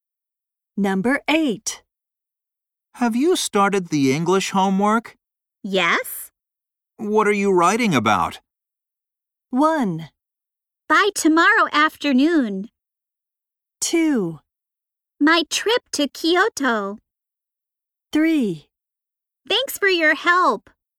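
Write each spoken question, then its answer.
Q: What are you writing about?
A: 2: My trip to Kyoto.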